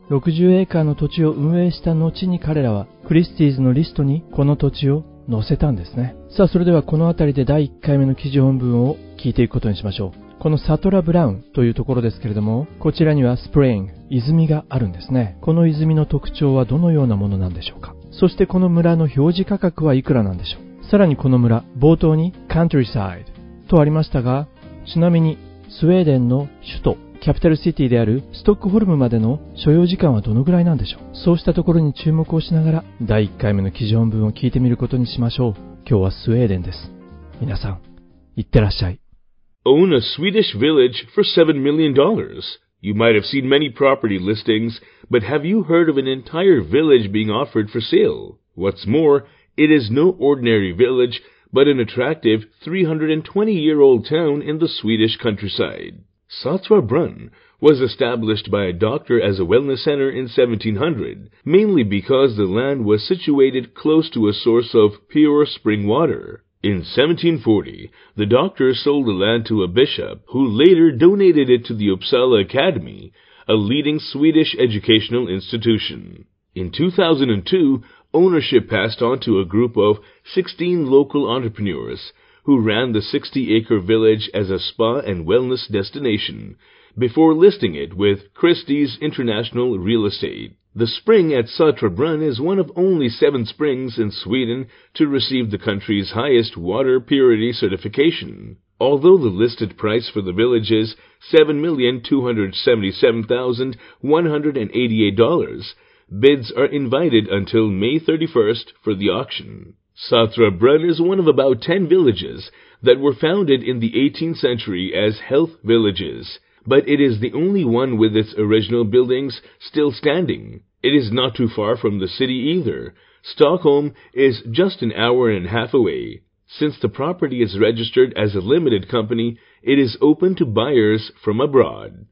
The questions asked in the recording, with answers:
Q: この泉の特徴はどのようなものなんでしょうか。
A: The spring at Saltsjöbaden is one of only 7 springs in Sweden to receive the country's highest water purity certification.

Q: そしてこの村の表示価格はいくらなんでしょう。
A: Listed Price、表示価格は

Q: ちなみにスウェーデンの首都、キャピタルシティであるストックホルムまでの所要時間はどのぐらいなんでしょう。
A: ちょうど1時間半ということなんですね。ストックホルムまで。